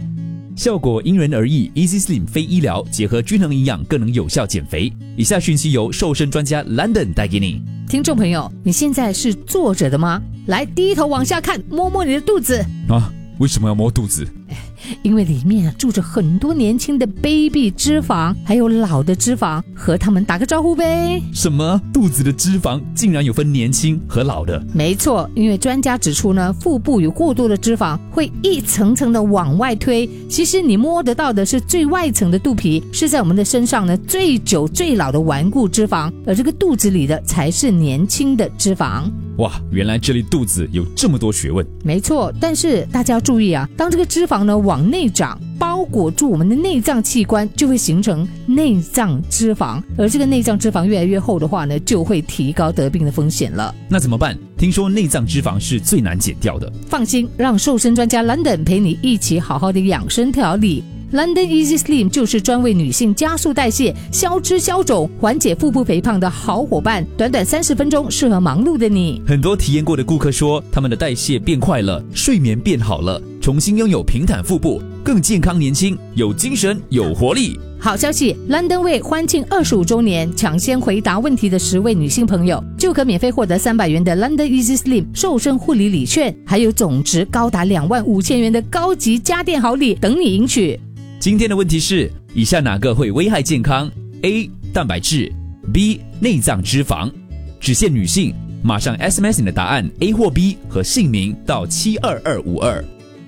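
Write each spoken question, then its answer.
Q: 今天的问题是,以下哪个会危害健康?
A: B: 内脏脂肪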